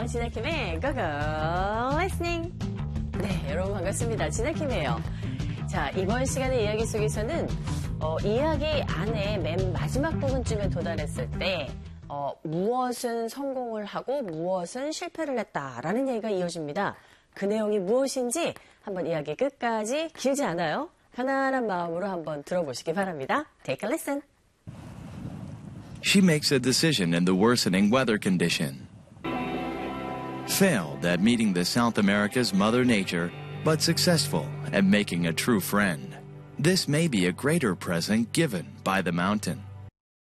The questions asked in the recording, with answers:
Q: 이야기 안에 맨 마지막 부분쯤에 도달했을 때 무엇은 성공을 하고 무엇은 실패를 했다라는 얘기가 이어집니다. 그 내용이 무엇인지 한번 이야기 끝까지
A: 진정한 친구를 사귄 것에는 성공을 했는데 이 대자연의 만남은 실패를 했다